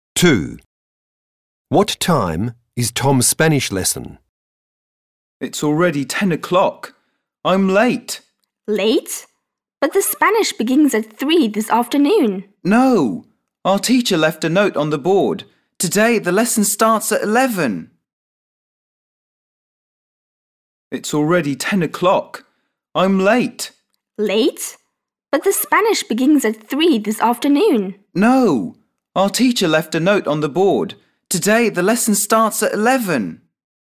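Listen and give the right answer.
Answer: At 11 o'clock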